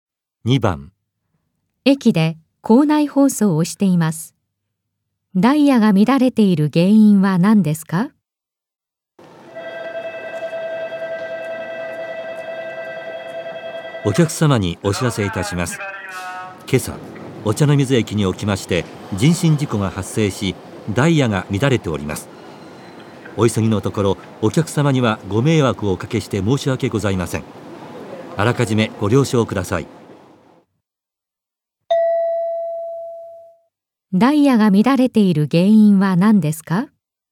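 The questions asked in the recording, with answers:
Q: ダイヤが乱れている原因は何ですか?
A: お茶の水駅で人身事故が発生したから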